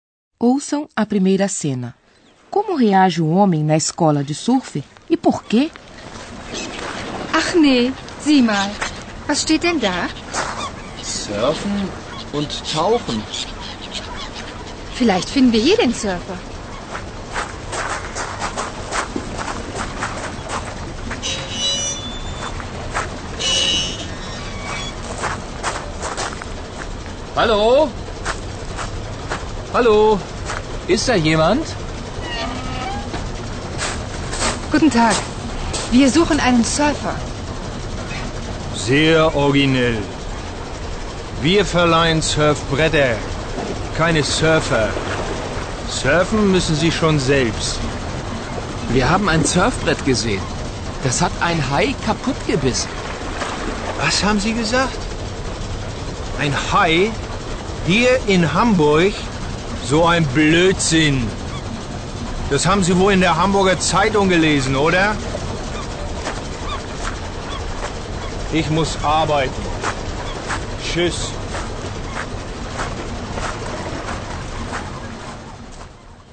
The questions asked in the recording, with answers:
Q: Como reage o homem na escola de surf e por quê?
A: O homem na escola de surf não estava de bom humor.